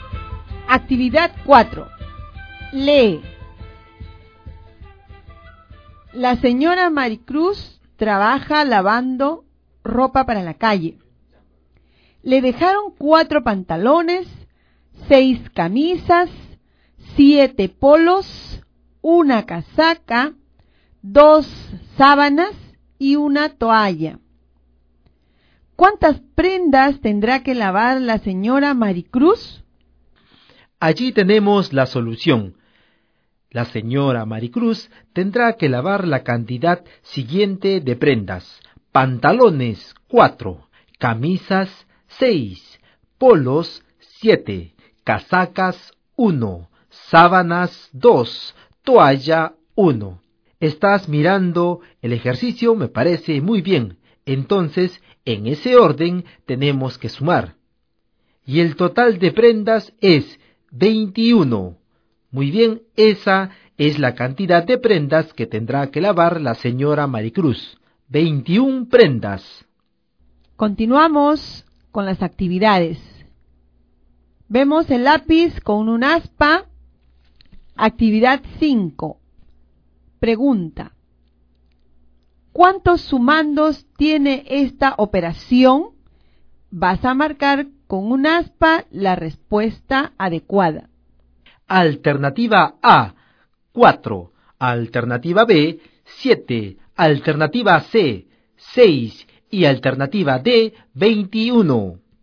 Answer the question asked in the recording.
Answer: He marcado la alternativa C, 6 sumandos.